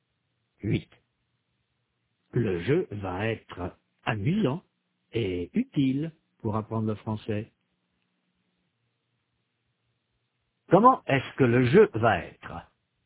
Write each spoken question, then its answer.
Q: Comment est-ce que le jeu va être?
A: Amusant et utile. Le jeu va être amusant et utile pour apprendre le français.